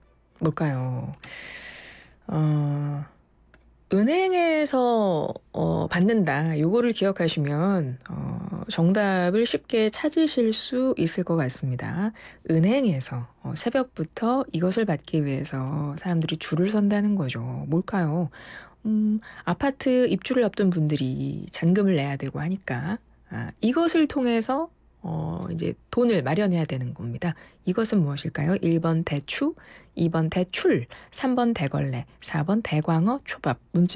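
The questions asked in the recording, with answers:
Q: 이것은 무엇일까요? 1번 대추, 2번 대출, 3번 대걸레, 4번 대광어, 초밥.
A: 2: 대출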